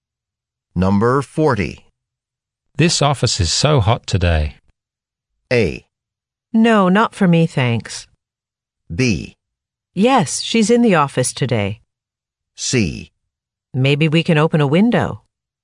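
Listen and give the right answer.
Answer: C: Maybe we can open a window.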